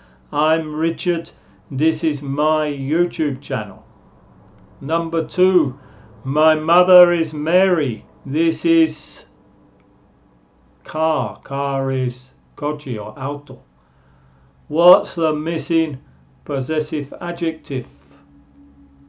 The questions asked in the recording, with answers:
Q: What's the missing possessive adjective?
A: my mother is Mary, this is her car.